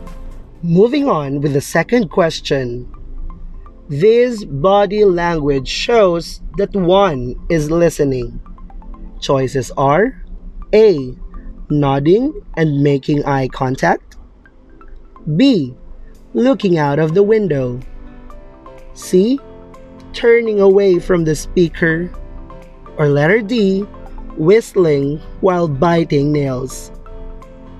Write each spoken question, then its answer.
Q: This body language shows that one is listening.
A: The answer is letter A.